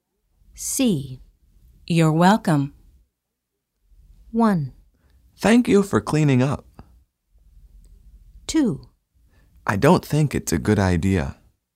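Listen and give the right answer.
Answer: 1: Thank you for cleaning up.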